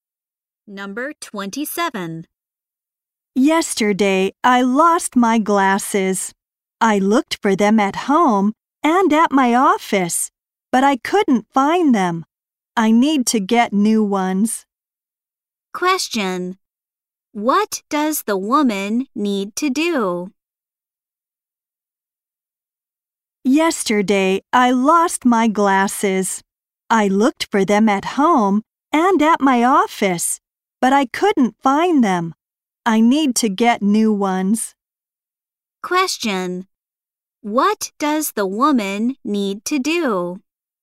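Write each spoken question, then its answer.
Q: What does the woman need to do?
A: Get new glasses.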